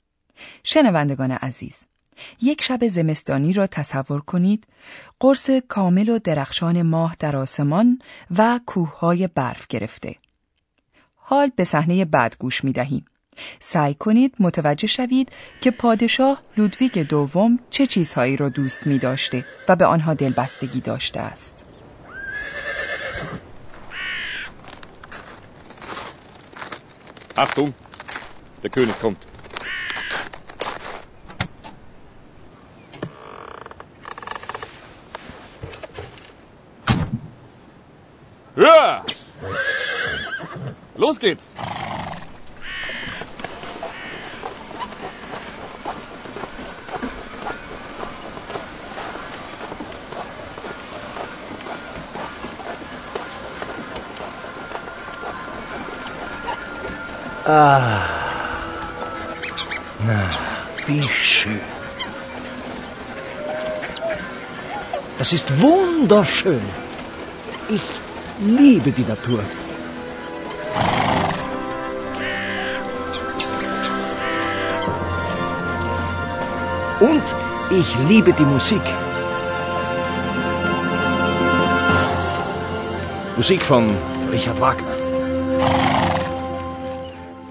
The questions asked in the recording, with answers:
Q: سعی کنید متوجه شوید که پادشاه لودویگ دوم چه چیزهایی را دوست می داشته و به آنها دلبستگی داشته است.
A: پادشاه لودویک شیفته موزیک بود.